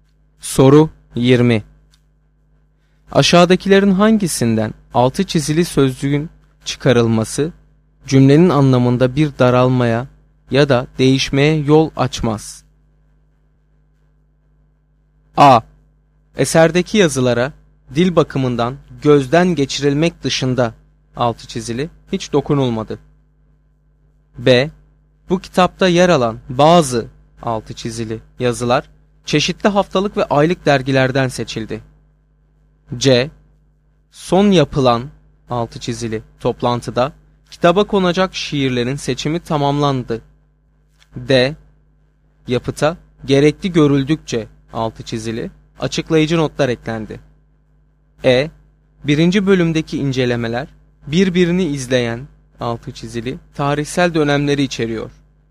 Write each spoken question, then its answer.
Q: Aşağıdakilerin hangisinden altı çizili sözcüğün çıkarılması cümlenin anlamında bir daralmaya ya da değişmeye yol açmaz?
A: Doğru cevap C şıkkı.